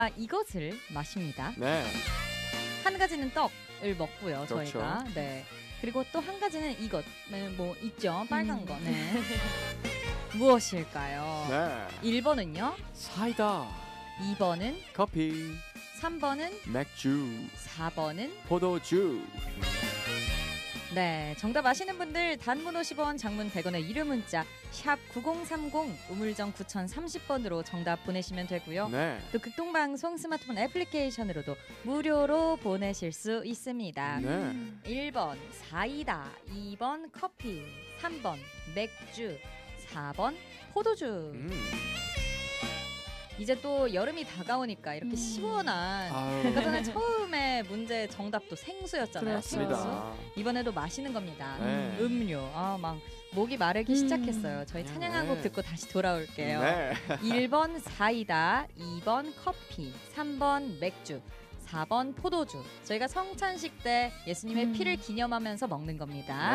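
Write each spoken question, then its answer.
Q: 무엇일까요?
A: 4: 포도주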